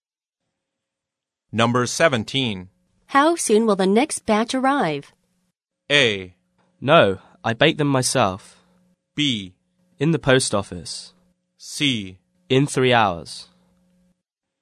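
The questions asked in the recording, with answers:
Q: How soon will the next batch arrive?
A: C: In 3 hours.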